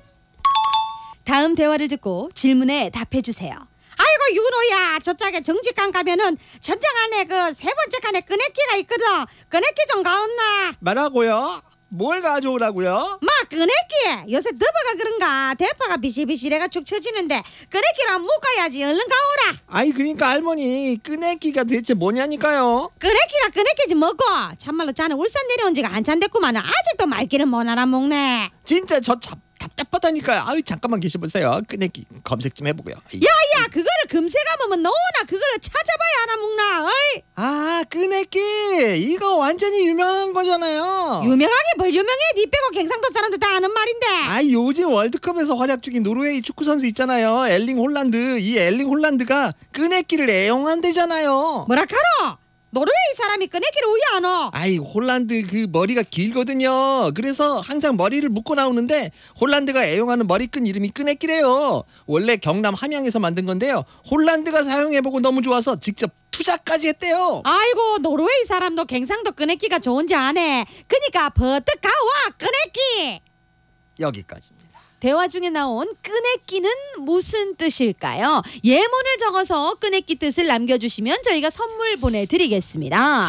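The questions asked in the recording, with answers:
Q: 대화 중에 나온 끄내끼는 무슨 뜻일까요?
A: 끈 (머리를 묶는 끈)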